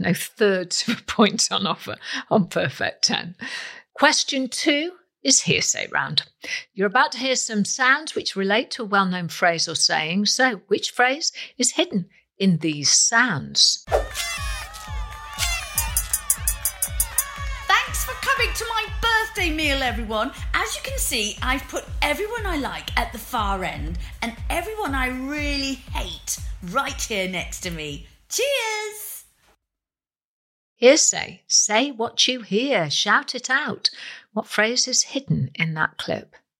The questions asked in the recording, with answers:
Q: What phrase is hidden in that clip?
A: Keep your friends close, but your enemies closer.